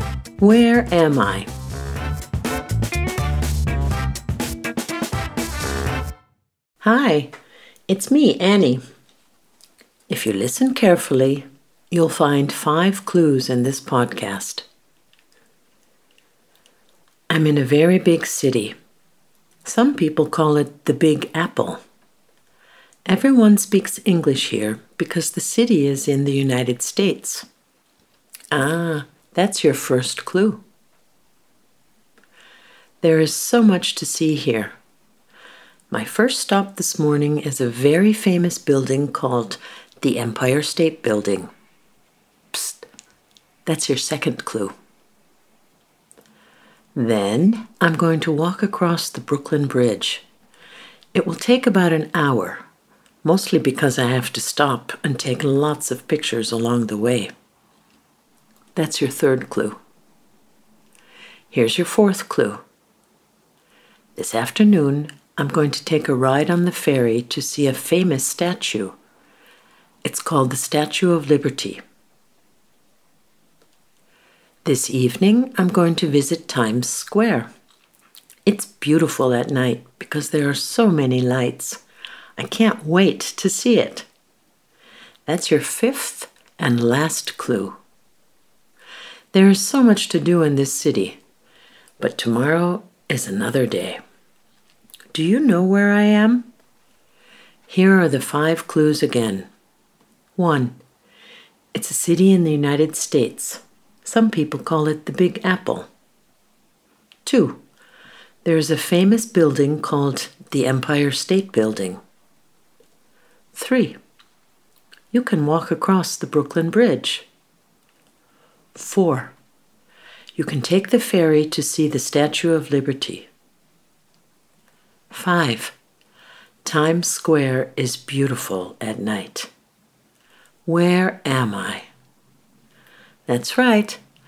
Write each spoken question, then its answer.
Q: Where am I?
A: I'm in New York.